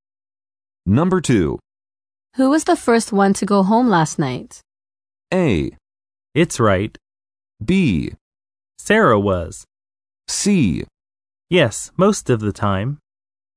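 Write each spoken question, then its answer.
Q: Who was the first one to go home last night?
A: B: Sarah was.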